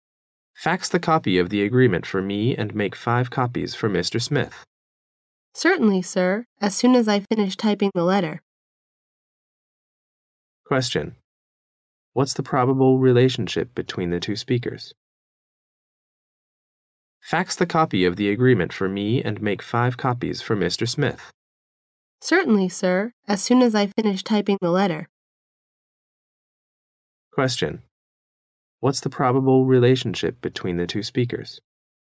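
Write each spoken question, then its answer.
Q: What's the probable relationship between the two speakers?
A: Boss and secretary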